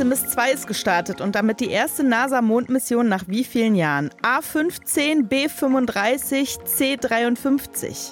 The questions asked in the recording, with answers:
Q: Artemis 2 ist gestartet und damit die erste NASA-Mondmission nach wie vielen Jahren?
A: Richtig.